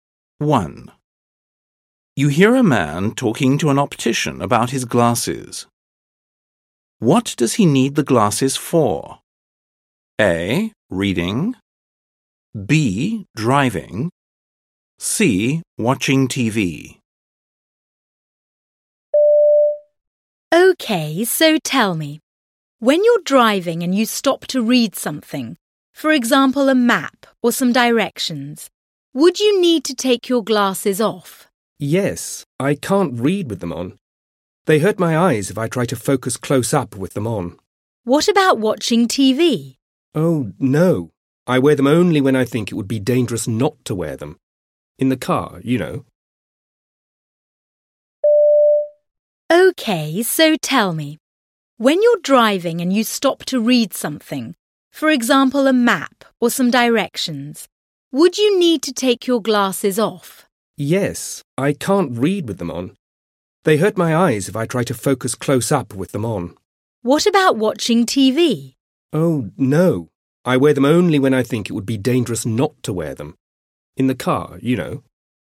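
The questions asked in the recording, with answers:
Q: What does he need the glasses for?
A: B: Driving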